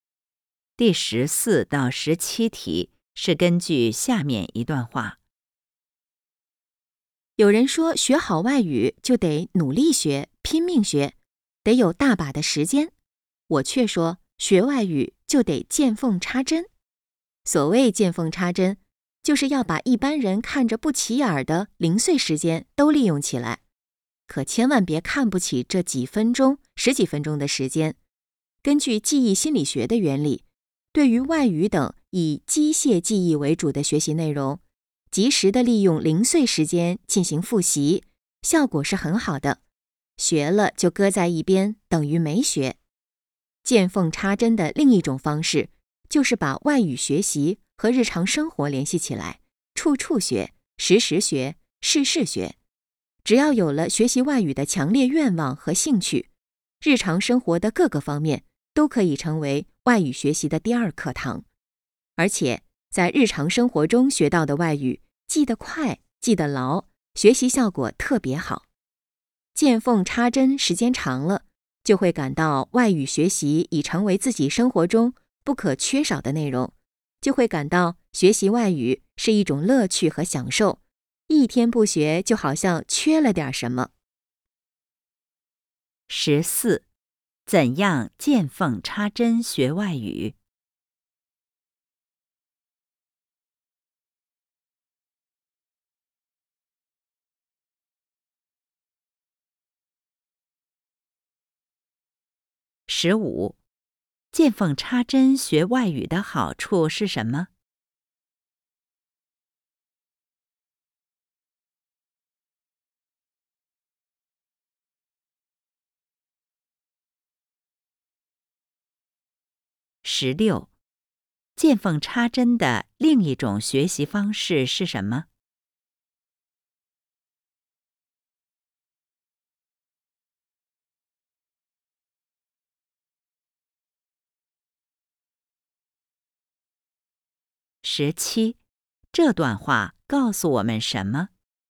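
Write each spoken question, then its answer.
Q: 怎样见缝插针学外语?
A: 把零碎时间都利用起来

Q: 见缝插针的另一种学习方式是什么?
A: 把外语学习和日常生活联系起来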